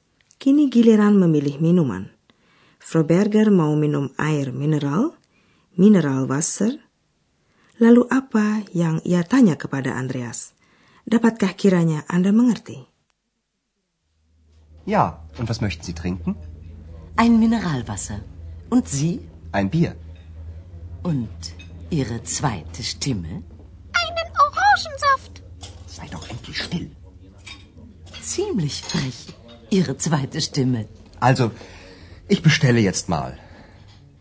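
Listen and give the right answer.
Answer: Andreas mau minum apa (Und Sie?)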